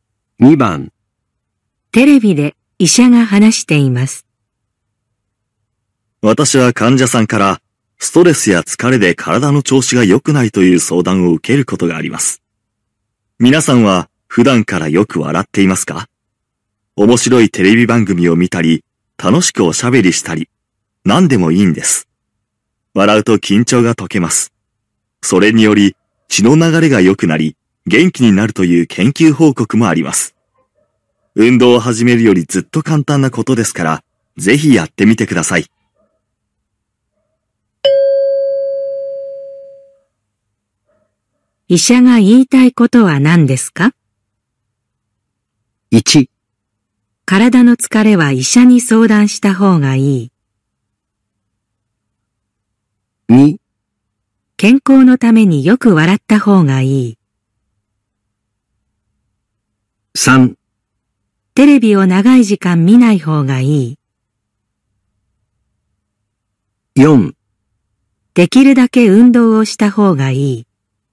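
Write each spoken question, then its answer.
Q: 医者が言いたいことは何ですか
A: 2: 健康のためによく笑った方がいい。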